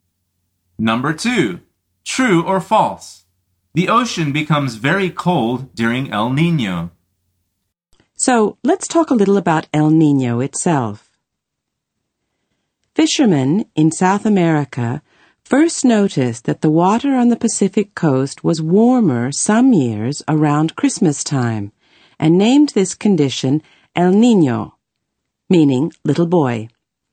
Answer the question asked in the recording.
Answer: The answer is false.